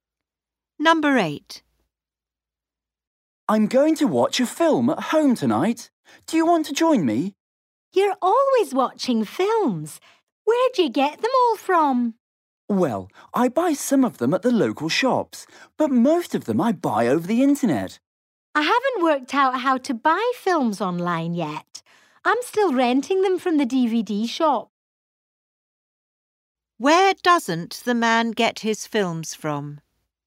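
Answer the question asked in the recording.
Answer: The DVD rental shop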